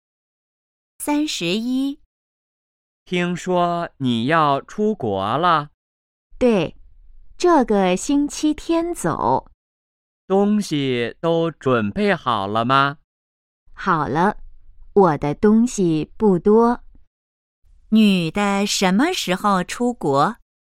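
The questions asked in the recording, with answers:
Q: 女的什么时候出国?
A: 这个星期天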